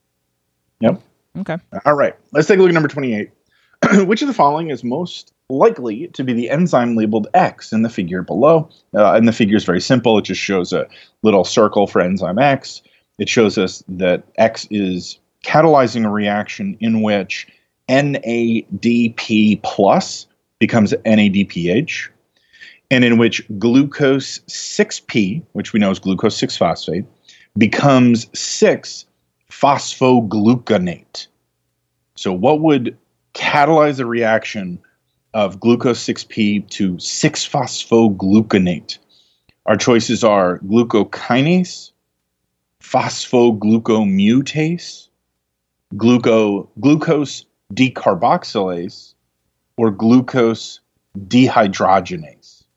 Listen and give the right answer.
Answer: D, glucose dehydrogenase.